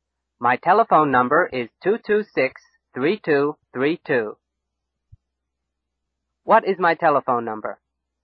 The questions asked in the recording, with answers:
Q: What is my telephone number?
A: 226-3232. My telephone number is 226-3232.